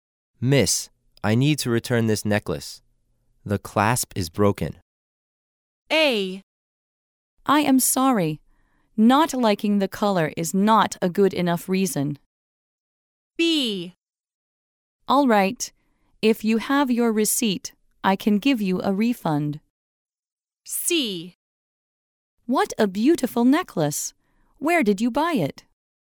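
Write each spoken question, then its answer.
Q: Miss, I need to return this necklace.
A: B: All right. If you have your receipt, I can give you a refund.

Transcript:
[听力原文] M: Miss, I need to return this necklace. The clasp is broken. W: A. I am sorry. Not liking the color is not a good enough reason. W: B. If you have your receipt, I can give you a refund. W: C. What a beautiful necklace. Where did you buy it?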